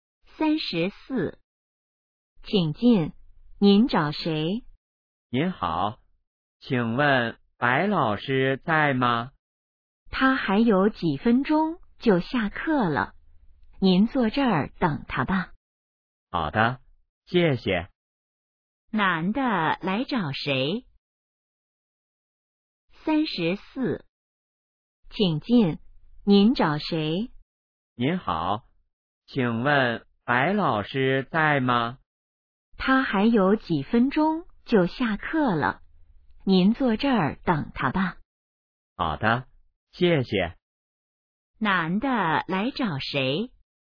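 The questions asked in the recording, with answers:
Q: 男的来找谁?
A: 白老师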